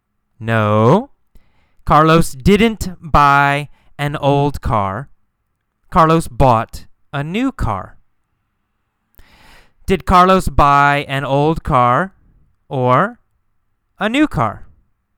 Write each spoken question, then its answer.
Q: Did Carlos buy an old car or a new car?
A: A new car. Carlos bought a new car.